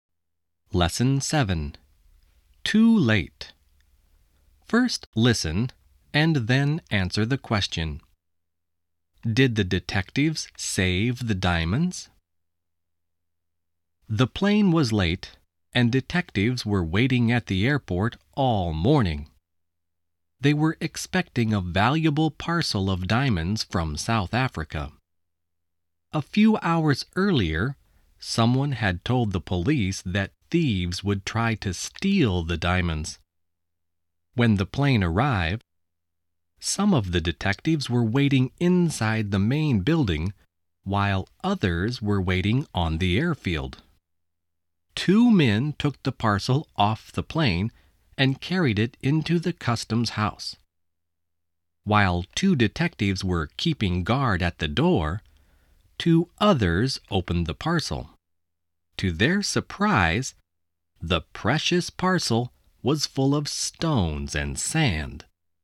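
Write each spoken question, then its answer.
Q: Did the detectives save the diamonds?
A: No, the parcel was full of stones and sand.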